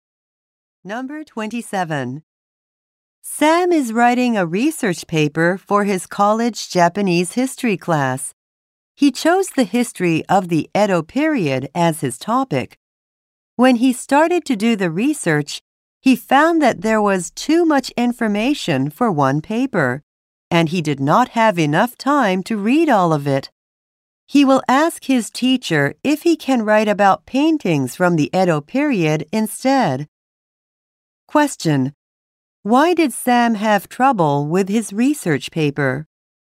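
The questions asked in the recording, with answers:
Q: Why did Sam have trouble with his research paper?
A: There was too much information and not enough time to read it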